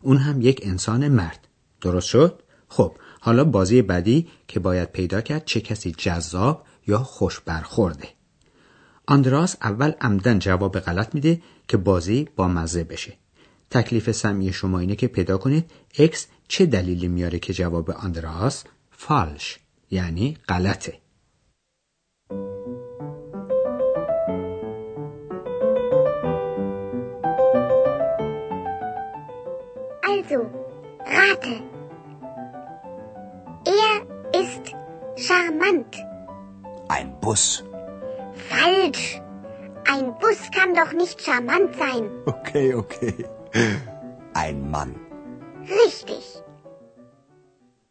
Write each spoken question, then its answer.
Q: تکلیف سمی شما اینه که پیدا کنید اکس چه دلیلی میاره که جواب آندراس فالش یعنی غلطه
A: واقعا هم اکس توضیحی رو که آندراس انتظارش رو داشت میده و میگه اتوبوس که نمیتونه جذاب باشه.